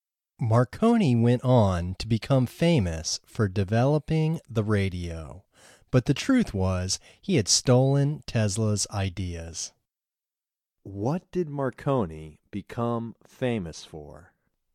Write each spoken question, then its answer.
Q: What did Marconi become famous for?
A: Marconi became famous for developing the radio.